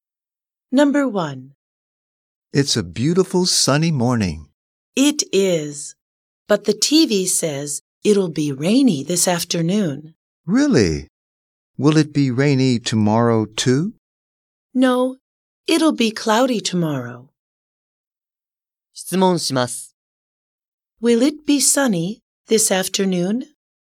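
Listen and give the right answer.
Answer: No, it will be rainy.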